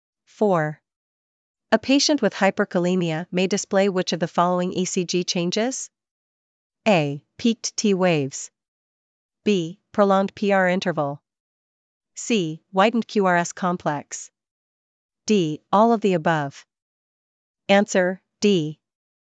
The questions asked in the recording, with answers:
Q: A patient with hyperkalemia may display which of the following ECG changes?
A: D. All of the above.